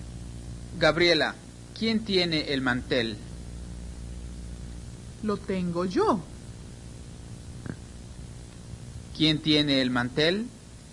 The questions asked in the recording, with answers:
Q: ¿Quién tiene el mantel?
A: Lo tiene Gabriela.